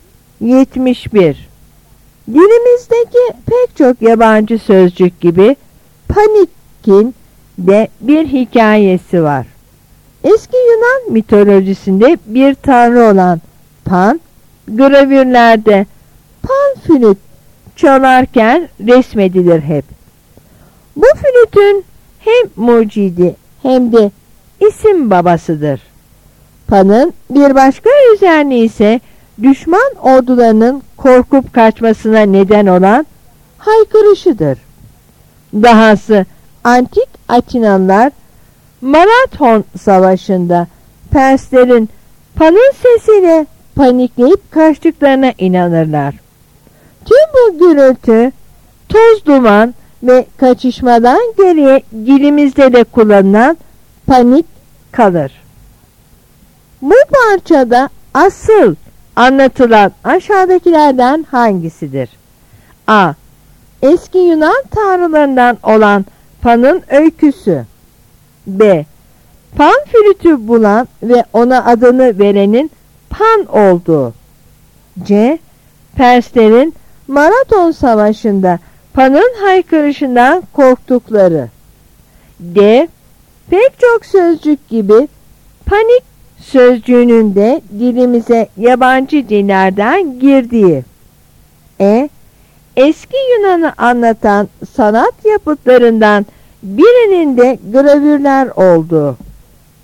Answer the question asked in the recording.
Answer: Yanıt D.